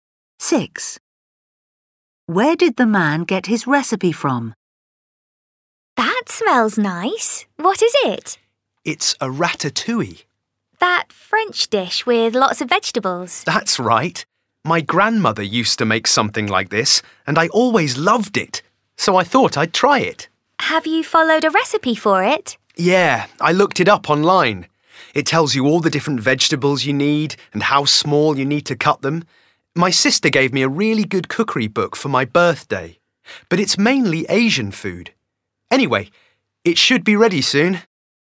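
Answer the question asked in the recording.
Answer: online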